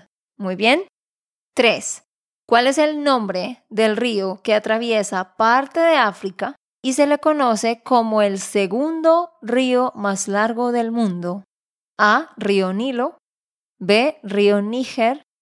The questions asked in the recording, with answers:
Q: ¿Cuál es el nombre del río que atraviesa parte de África y se le conoce como el segundo río más largo del mundo.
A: Así que la respuesta era la A, Nilo.